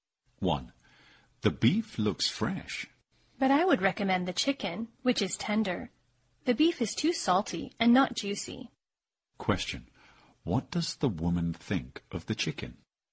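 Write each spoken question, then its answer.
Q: What does the woman think of the chicken?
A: It is tender.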